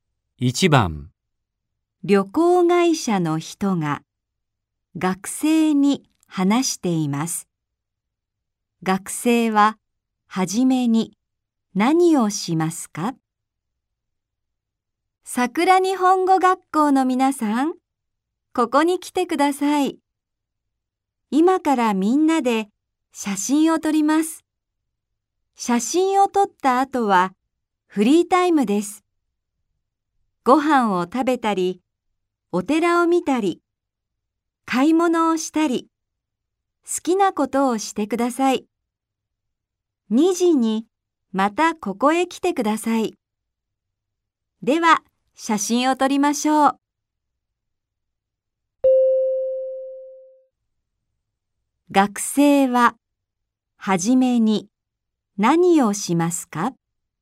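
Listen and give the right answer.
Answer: みんなで写真を撮る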